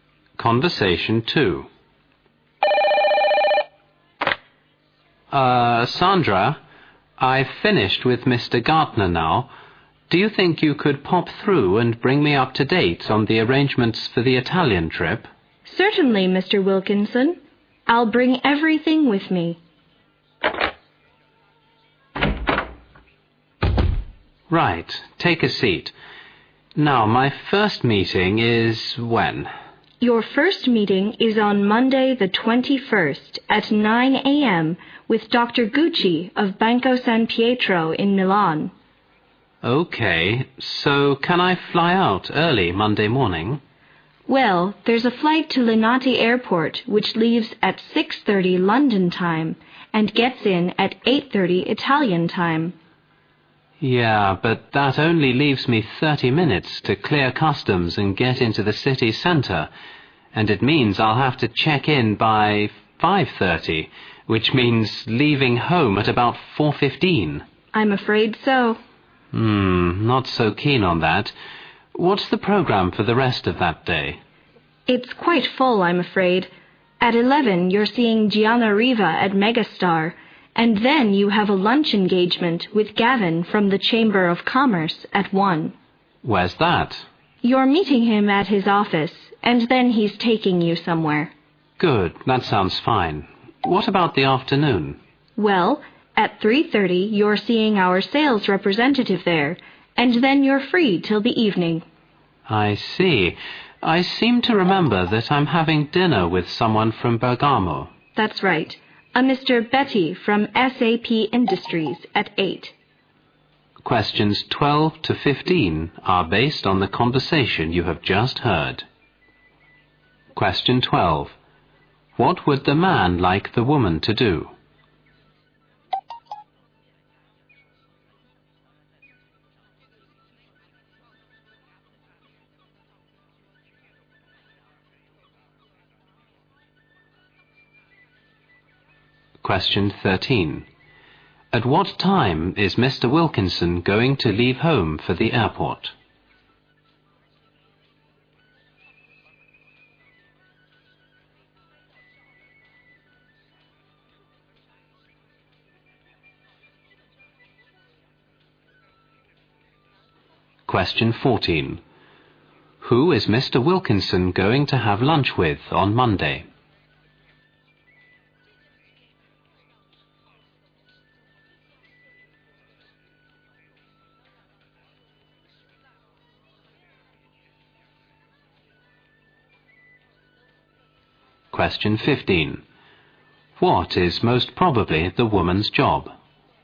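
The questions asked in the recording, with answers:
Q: What would the man like the woman to do?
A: Update him on the arrangements for the Italian trip

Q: At what time is Mr. Wilkinson going to leave home for the airport?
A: At about 4:15

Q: Who is Mr. Wilkinson going to have lunch with on Monday?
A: Gavin from the Chamber of Commerce

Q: What is most probably the woman's job?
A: Secretary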